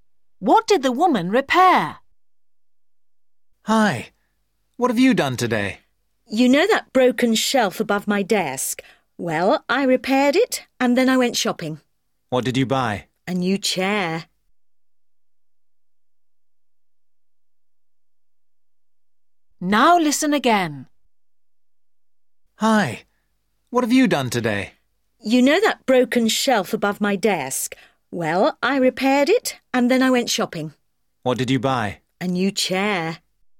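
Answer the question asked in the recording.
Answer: a shelf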